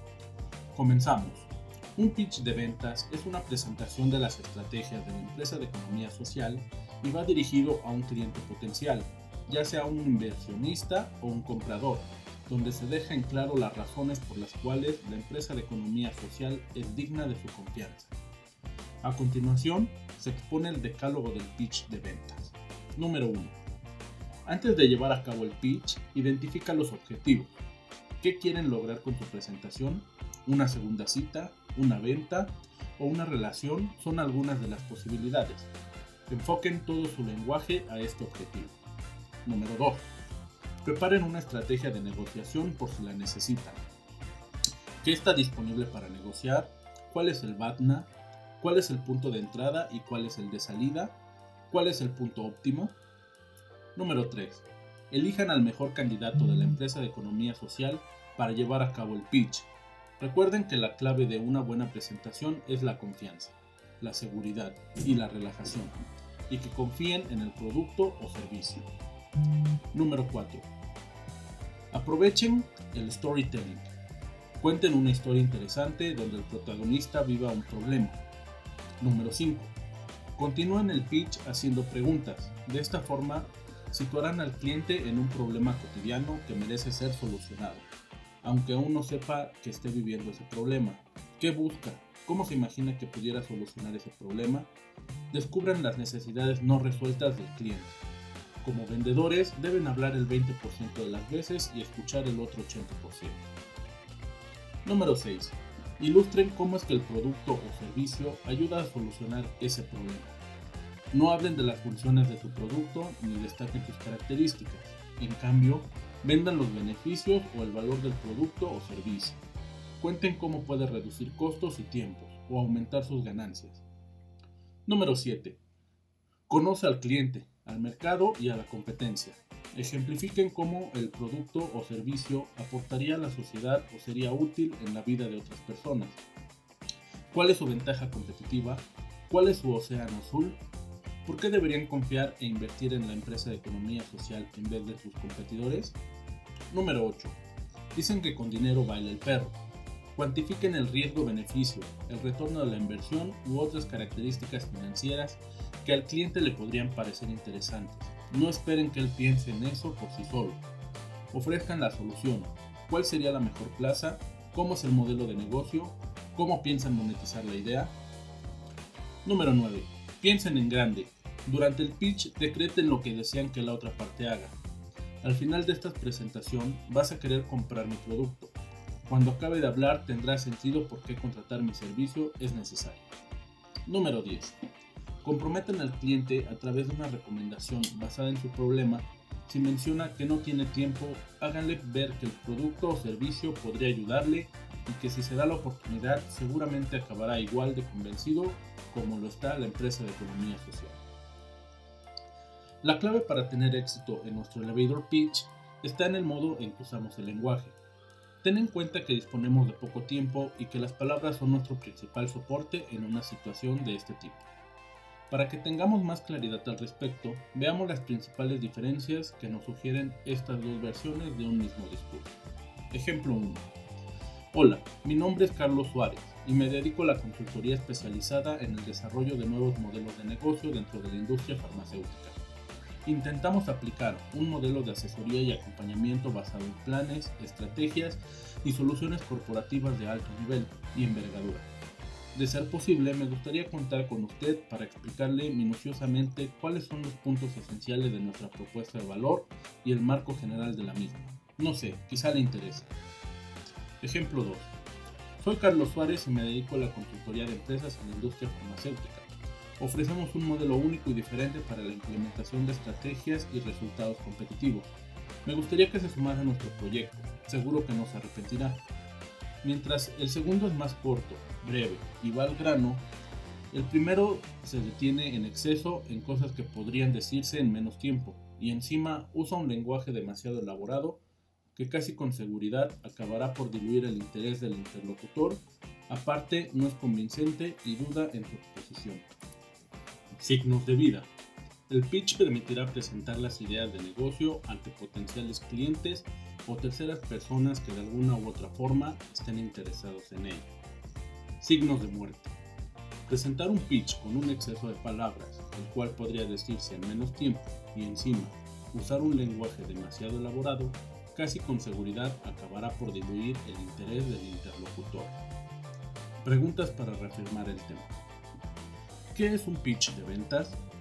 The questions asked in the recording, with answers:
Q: ¿Qué es un pitch de ventas?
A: Es una presentación de las estrategias de la empresa de economía social y va dirigido a un cliente potencial, ya sea un inversionista o un comprador donde se dejen claras las razones por las cuales la empresa de economía social es digna de tu confianza.